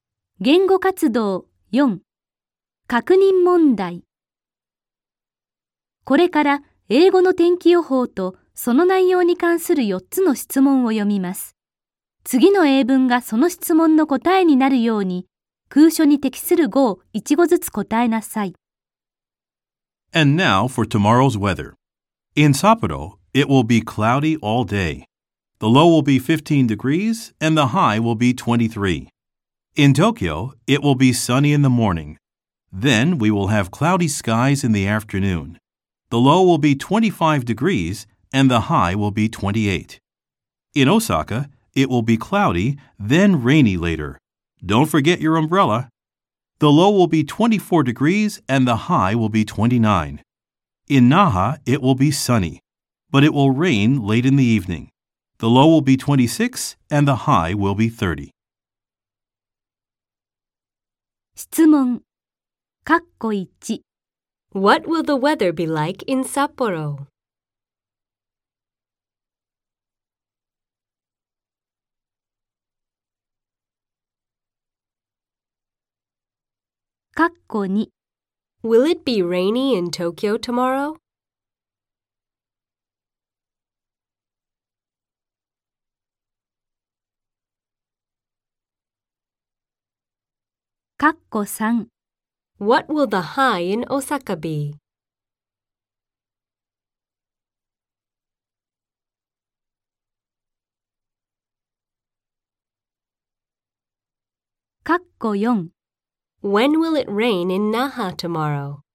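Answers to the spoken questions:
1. It will be cloudy all day.
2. No, it won't.
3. 29 degrees
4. Late in the evening.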